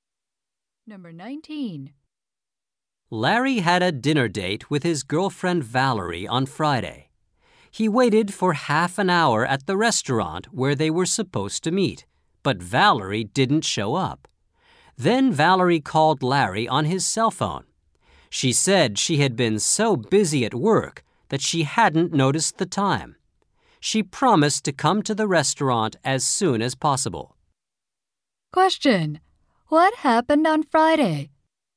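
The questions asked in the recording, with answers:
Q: What happened on Friday?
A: Valerie was late for their dinner date because she was busy at work.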